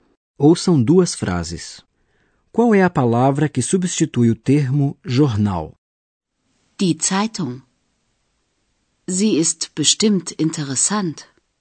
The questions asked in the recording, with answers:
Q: Qual é a palavra que substitui o termo jornal?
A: A palavra jornal é substituída pelo pronome sie.